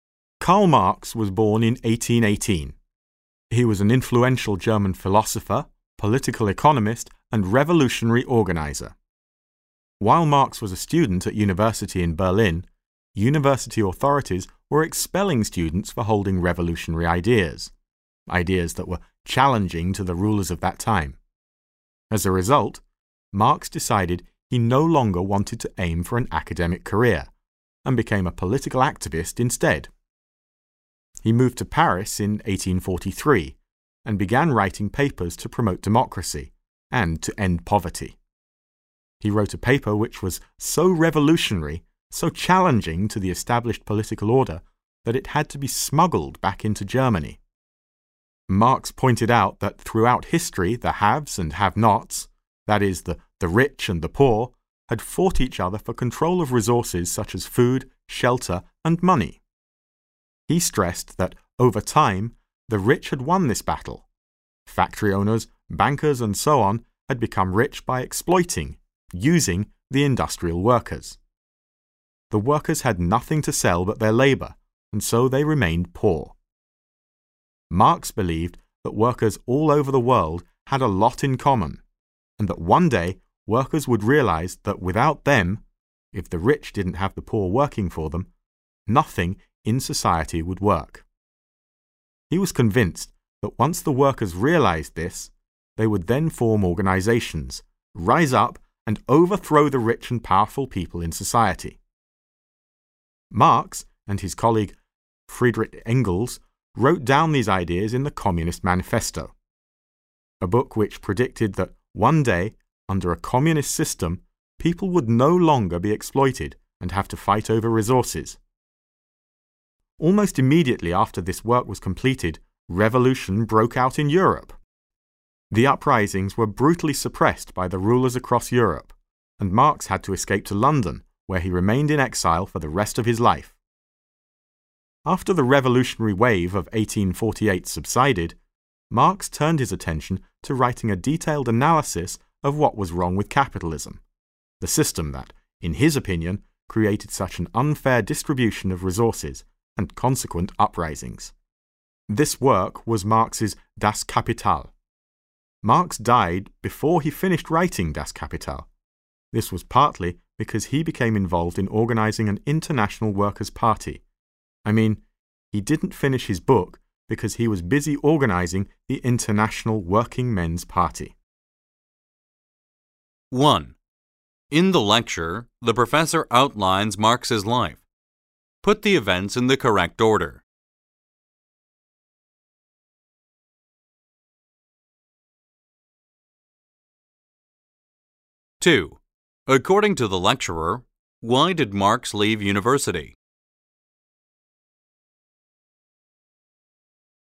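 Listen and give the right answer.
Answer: Because the authorities were expelling students for revolutionary ideas, so he gave up on an academic career and became a political activist.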